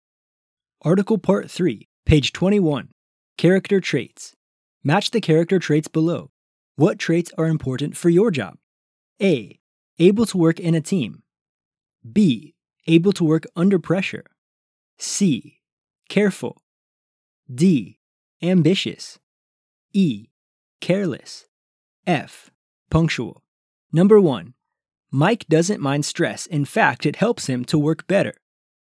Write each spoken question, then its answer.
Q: Mike doesn't mind stress. In fact, it helps him to work better.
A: B. Able to work under pressure.